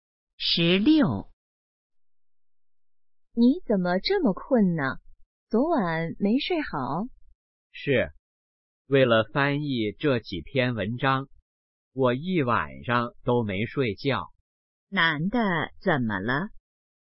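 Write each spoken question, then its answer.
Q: 男的怎么了?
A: 一晚上没睡觉,很困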